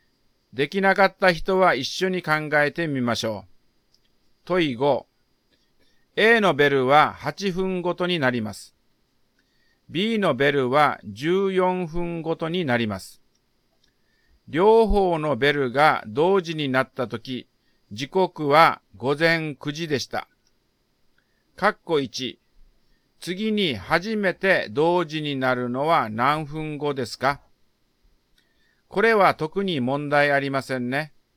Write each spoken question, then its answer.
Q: 括弧1。次に初めて同時になるのは何分後ですか?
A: だから、括弧1の答えは56分後です。